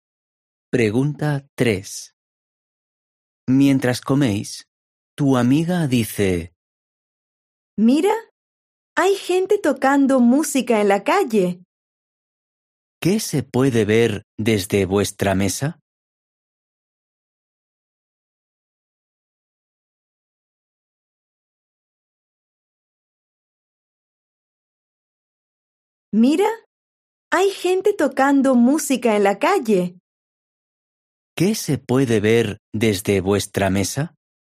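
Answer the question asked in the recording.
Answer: Gente tocando música en la calle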